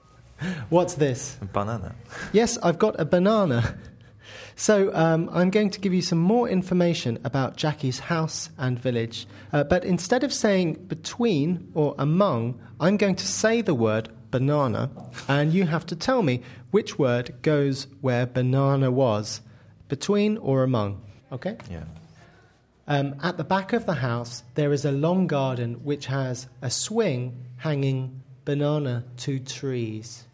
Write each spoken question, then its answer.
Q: At the back of the house, there is a long garden which has a swing hanging banana to trees.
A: Because there's two trees, there's a swing hanging between them, not among them.